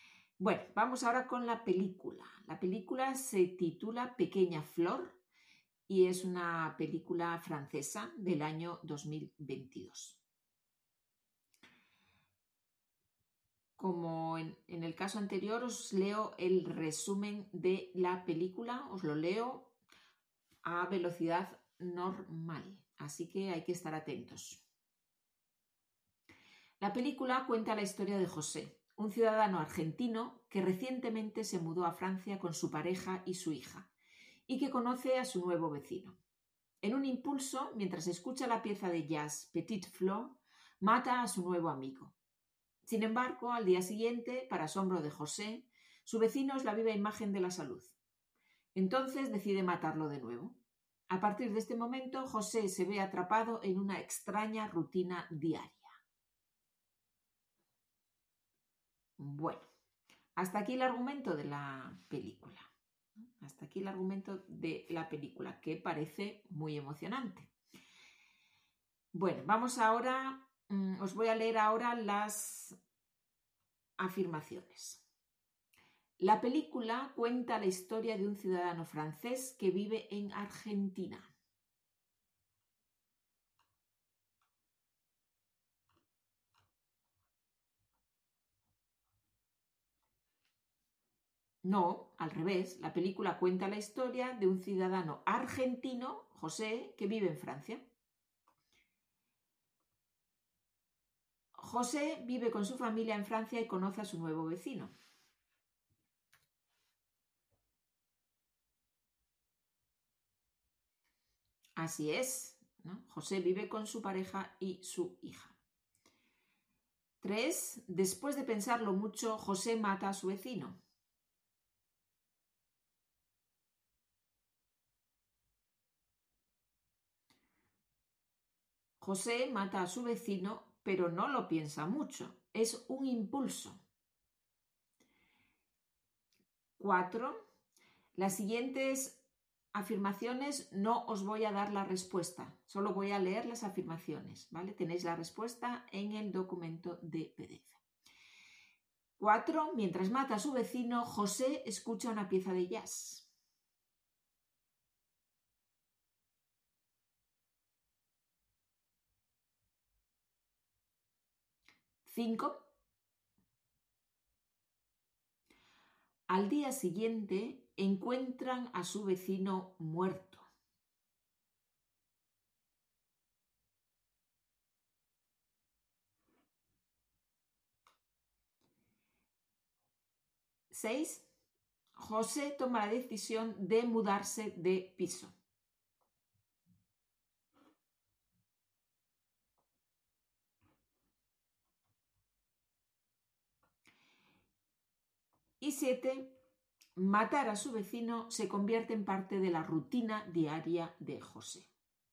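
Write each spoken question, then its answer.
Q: La película cuenta la historia de un ciudadano francés que vive en Argentina.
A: No, al revés. La película cuenta la historia de un ciudadano argentino, José, que vive en Francia.

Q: José vive con su familia en Francia y conoce a su nuevo vecino.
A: Así es, ¿no? José vive con su pareja y su hija.

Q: después de pensarlo mucho, José mata a su vecino.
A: José mata a su vecino. Pero no lo piensa mucho, es un impulso.

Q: Mientras mata a su vecino, José escucha una pieza de jazz.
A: Verdadero

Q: Al día siguiente encuentran a su vecino muerto.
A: Falso: el vecino está perfectamente sano

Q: José toma la decisión de mudarse de piso.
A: Falso: decide matarlo de nuevo

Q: matar a su vecino se convierte en parte de la rutina diaria de José.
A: Verdadero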